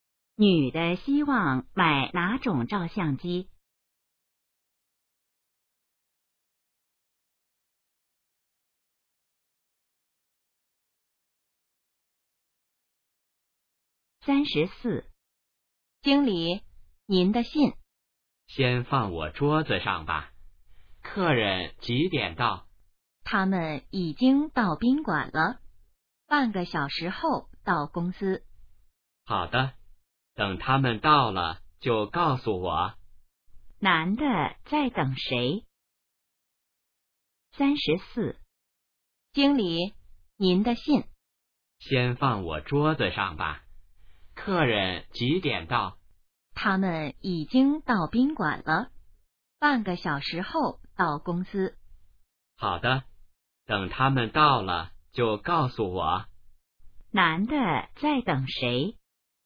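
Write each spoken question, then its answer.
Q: 男的在等谁?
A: 客人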